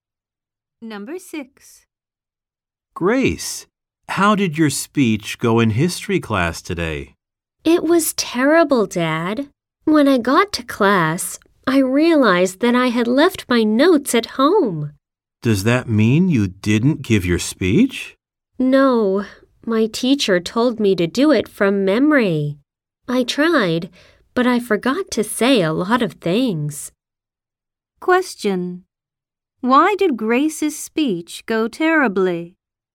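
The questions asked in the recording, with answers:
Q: Why did Grace's speech go terribly?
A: She left her notes at home and forgot a lot.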